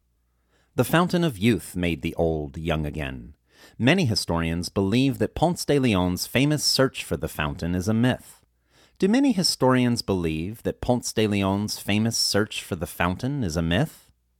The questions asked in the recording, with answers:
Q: Do many historians believe that Ponce de Leon's famous search for the fountain is a myth?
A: Yes, many historians believe that Ponce de Leon's famous search for the fountain is a myth.